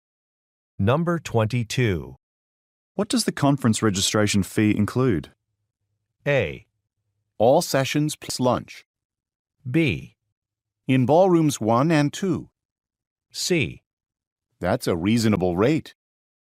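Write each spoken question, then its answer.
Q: What does the conference registration fee include?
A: A: All sessions plus lunch.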